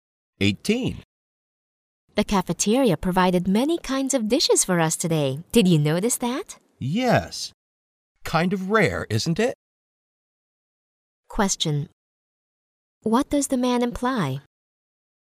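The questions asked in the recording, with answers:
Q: What does the man imply?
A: It is unusual for the cafeteria to offer so many dishes.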